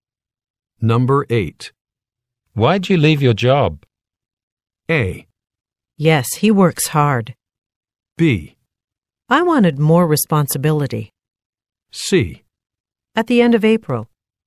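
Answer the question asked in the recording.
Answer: B: I wanted more responsibility.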